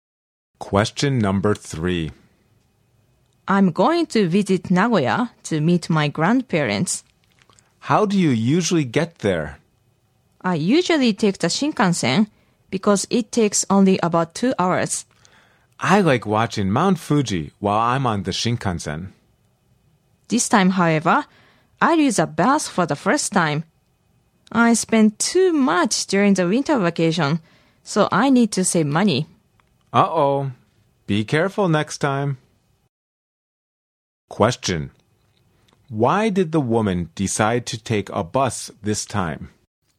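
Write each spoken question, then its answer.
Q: Why did the woman decide to take a bus this time?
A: Because she needs to save money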